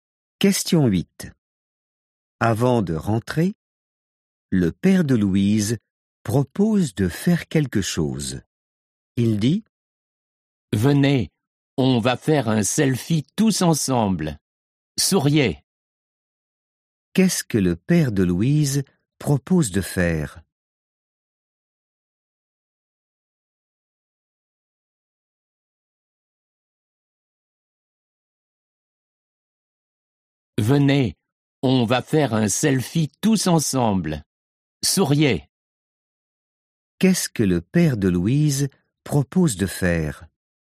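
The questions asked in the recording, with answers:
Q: Qu'est-ce que le père de Louise propose de faire ?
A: Faire un selfie tous ensemble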